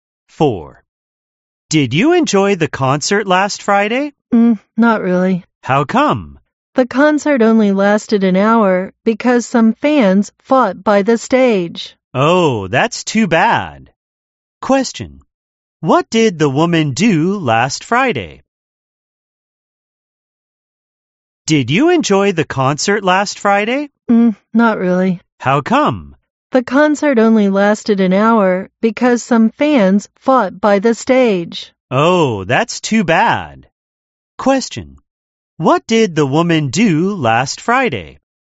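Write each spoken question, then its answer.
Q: What did the woman do last Friday?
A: She went to a concert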